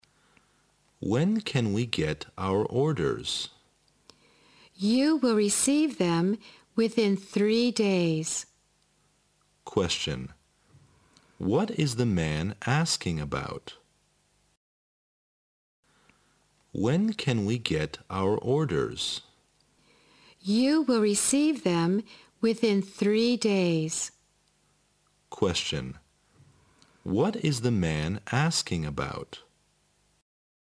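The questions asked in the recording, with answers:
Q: What is the man asking about?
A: When they can get their orders (delivery time)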